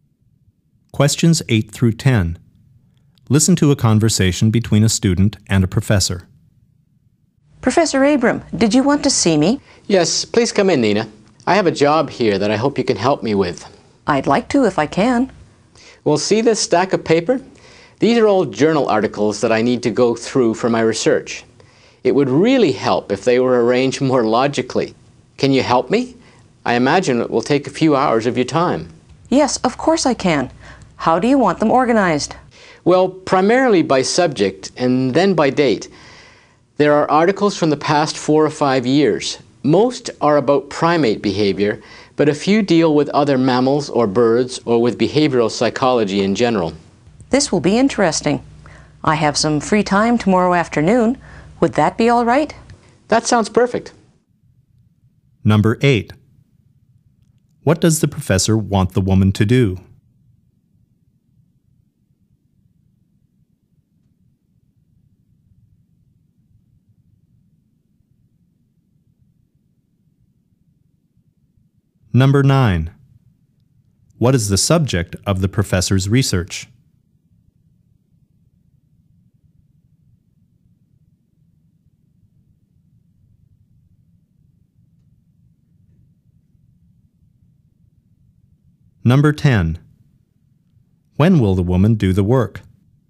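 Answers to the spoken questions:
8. Organize journal articles by subject and date
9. Primate behavior
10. Tomorrow afternoon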